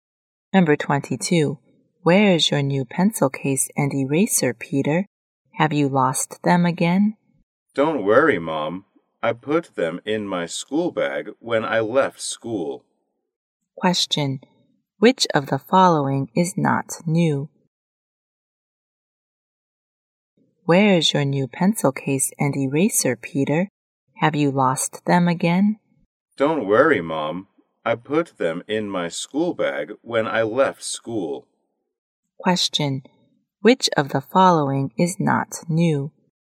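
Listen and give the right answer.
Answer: His school bag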